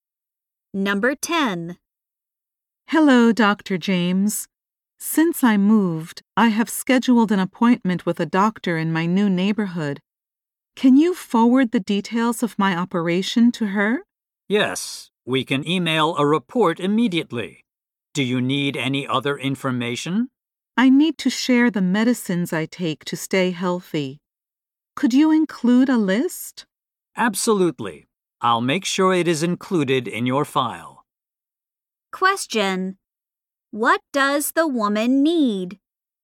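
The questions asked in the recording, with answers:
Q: What does the woman need?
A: Her medical records and a list of her medicines sent to her new doctor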